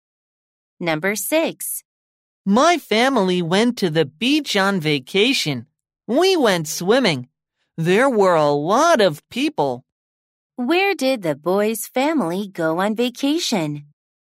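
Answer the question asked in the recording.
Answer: To the beach.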